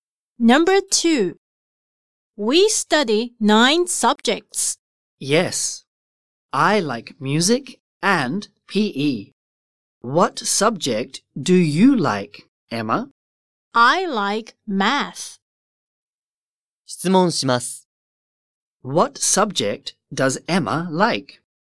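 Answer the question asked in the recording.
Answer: Math.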